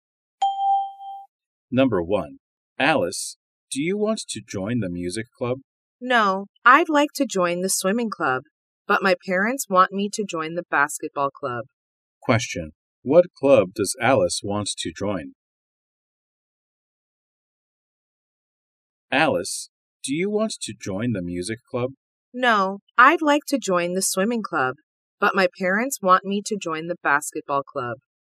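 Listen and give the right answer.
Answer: The swimming club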